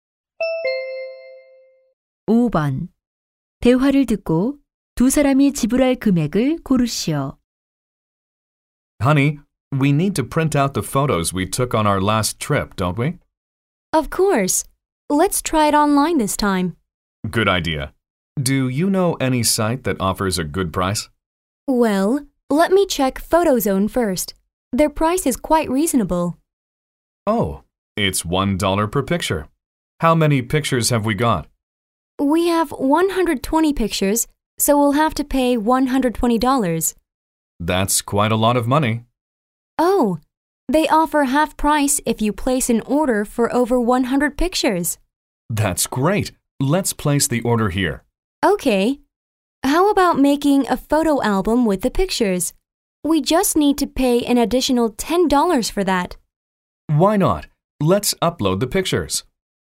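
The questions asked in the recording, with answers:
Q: 대화를 듣고 두 사람이 지불할 금액을 고르시오.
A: $70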